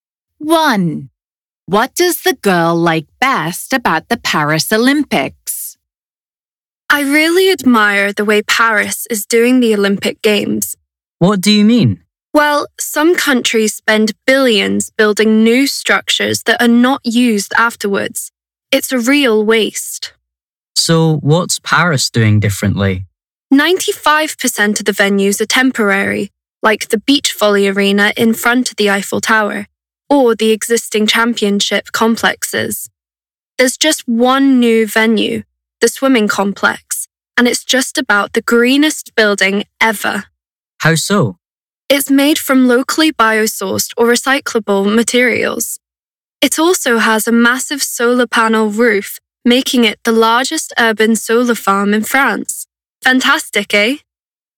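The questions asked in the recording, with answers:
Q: What does the girl like best about the Paris Olympics?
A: It avoids waste: most venues are temporary or already exist, and the one new venue is very green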